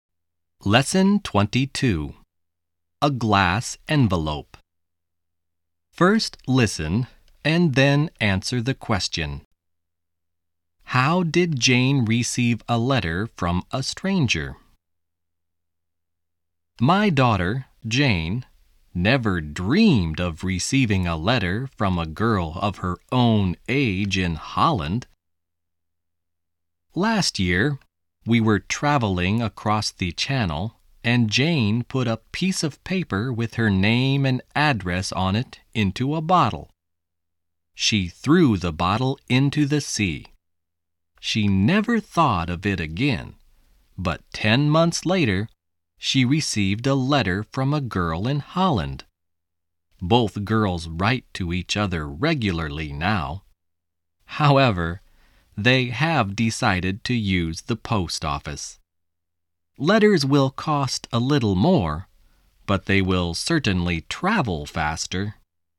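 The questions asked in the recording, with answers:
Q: How did Jane receive a letter from a stranger?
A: She put her name and address in a bottle and threw it into the sea; a girl in Holland found it and wrote to her.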